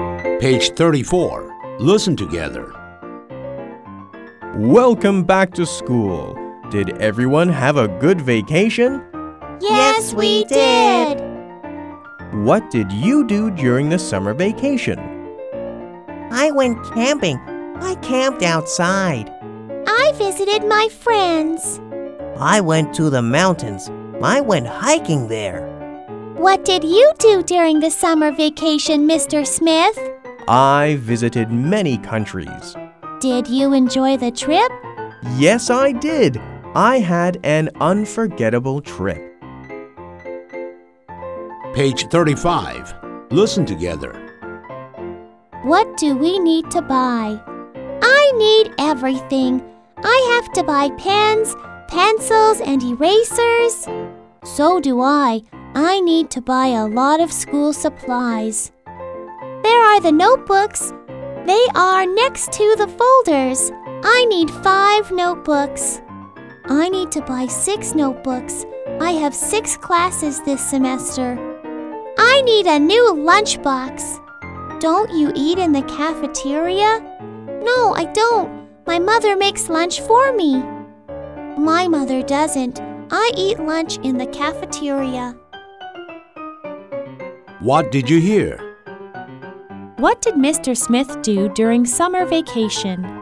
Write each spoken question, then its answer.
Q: What did Mr. Smith do during summer vacation?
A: He visited many countries.